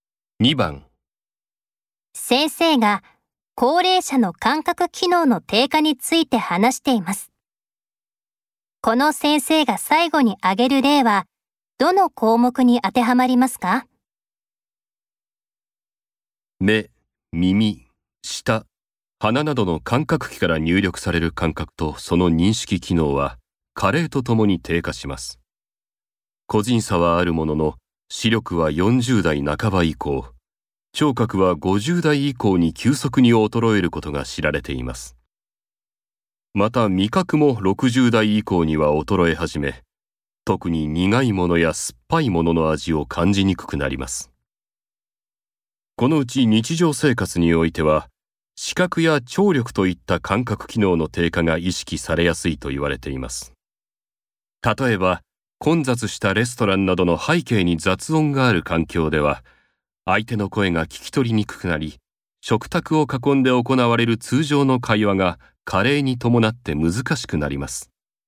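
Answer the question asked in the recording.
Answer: 聴覚(耳)の低下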